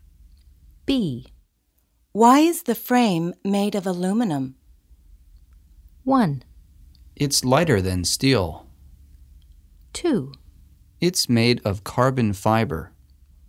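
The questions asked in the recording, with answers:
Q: Why is the frame made of aluminum?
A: 1: It's lighter than steel.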